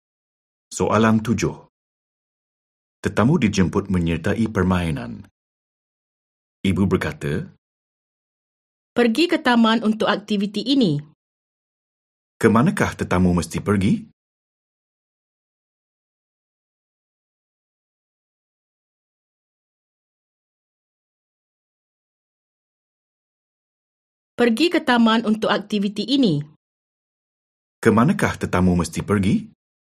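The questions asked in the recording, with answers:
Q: Kemanakah tetamu mesti pergi?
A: Ke taman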